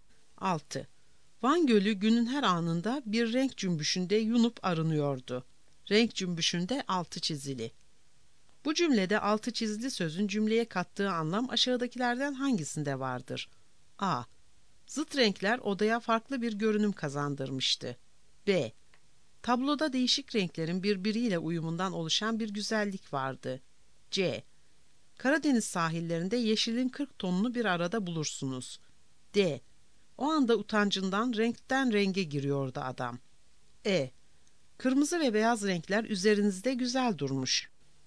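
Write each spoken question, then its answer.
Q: Bu cümlede altı çizili sözün cümleye kattığı anlam aşağıdakilerden hangisinde vardır?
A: B: Tabloda değişik renklerin birbiriyle uyumundan oluşan bir güzellik vardı.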